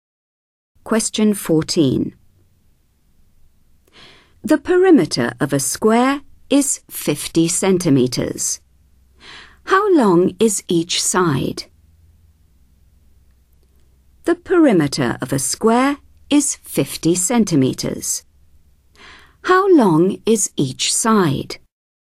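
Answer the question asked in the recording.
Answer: 12.5 centimetres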